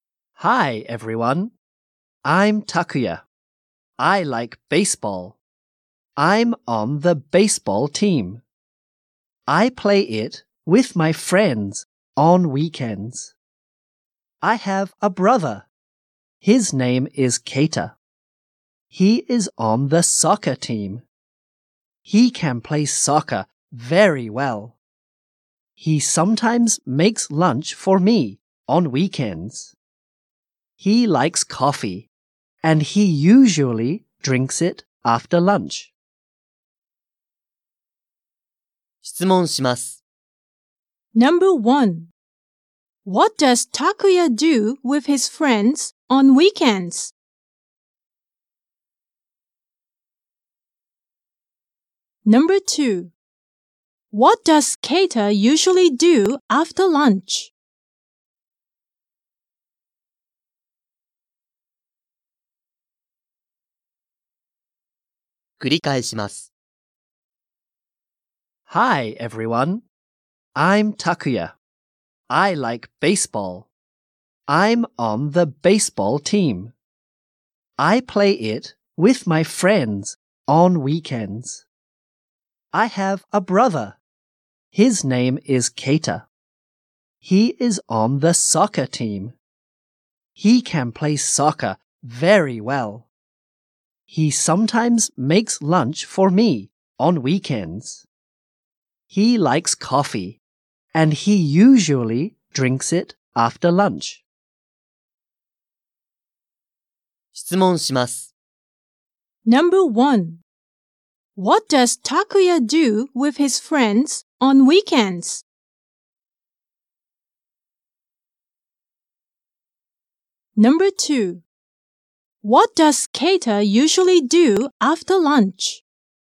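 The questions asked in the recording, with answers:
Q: What does Takuya do with his friends on weekends?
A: He plays baseball.

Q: What does Keita usually do after lunch?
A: He drinks coffee.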